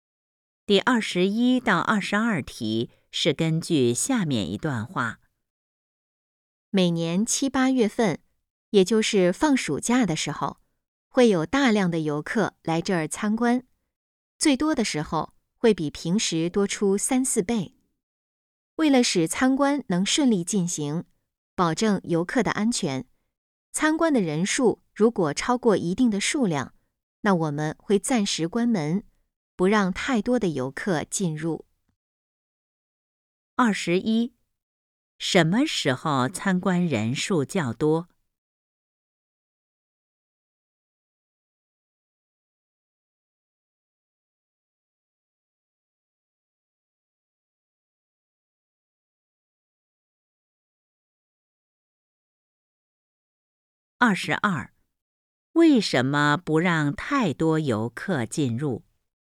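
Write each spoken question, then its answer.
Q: 什么时候参观人数较多?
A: 每年七八月份,放暑假的时候

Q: 为什么不让太多游客进入?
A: 为了保证游客的安全,让参观顺利进行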